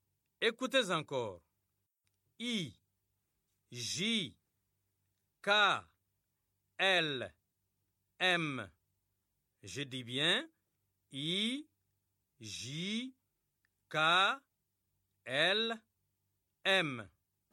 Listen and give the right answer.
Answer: J'espère que les élèves ont écrit N.